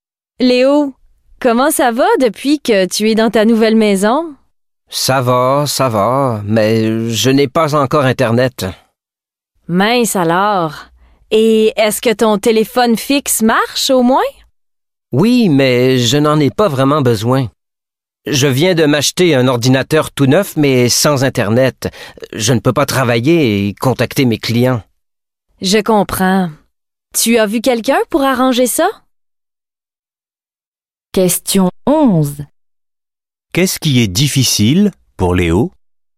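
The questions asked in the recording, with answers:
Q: Qu'est-ce qui est difficile pour Léo?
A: Il n'a pas encore Internet, donc il ne peut pas travailler ni contacter ses clients.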